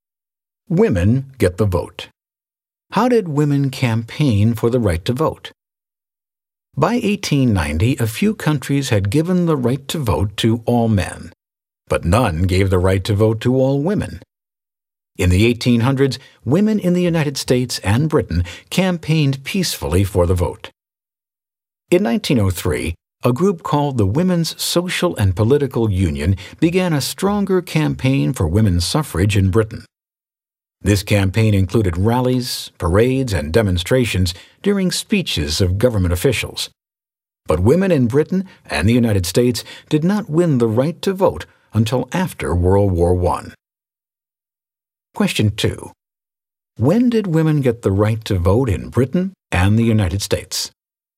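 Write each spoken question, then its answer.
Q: When did women get the right to vote in Britain and the United States?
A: After World War I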